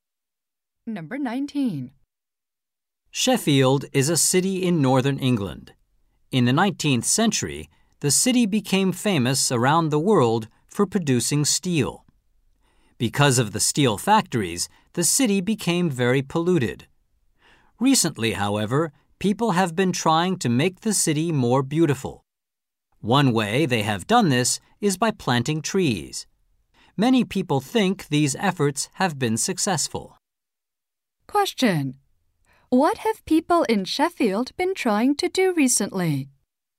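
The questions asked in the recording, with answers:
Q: What have people in Sheffield been trying to do recently?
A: Make the city more beautiful, such as by planting trees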